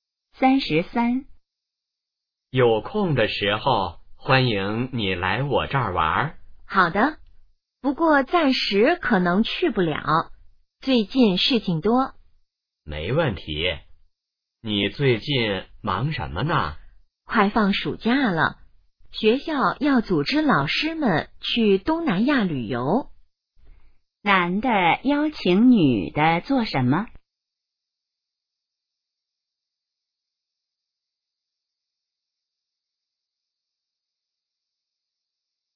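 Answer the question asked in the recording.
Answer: 来他那儿玩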